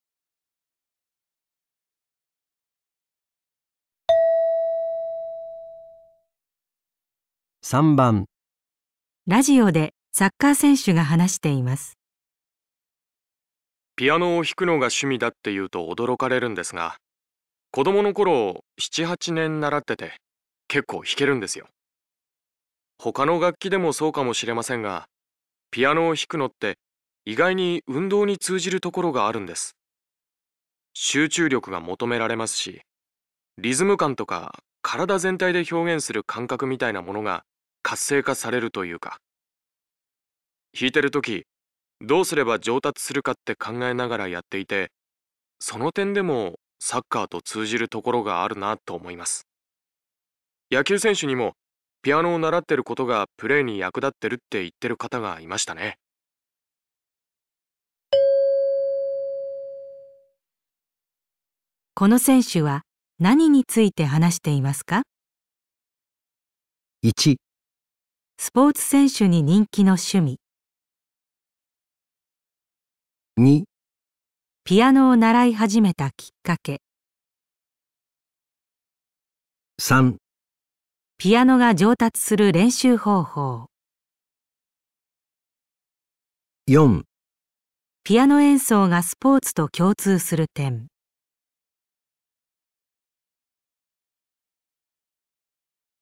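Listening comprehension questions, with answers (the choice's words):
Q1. この選手は何について話していますか。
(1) スポーツ選手に人気の趣味。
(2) ピアノを習い始めたきっかけ。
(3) ピアノが上達する練習方法。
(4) ピアノ演奏がスポーツと共通する点。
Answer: ピアノ演奏がスポーツと共通する点。

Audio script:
集中力が求めら れますし、リズム感とか体全体で表現する感覚みたいなものが活性化されるというか、聞いてる時、どうすれば 上達するかって考えながらやっていて、 その点でもサッカーと通じるところがあるなと思います。 野球選手にも ピアノ習ってることがプレーに役立ってるって言ってる方がいましたね。
問題:この選手は何について話していますか。

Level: 【N1 第1回】聴解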